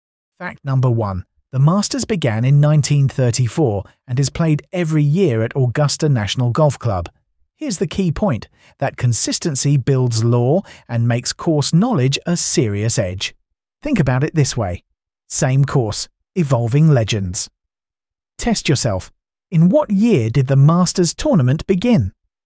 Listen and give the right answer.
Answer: Correct answer, 1934.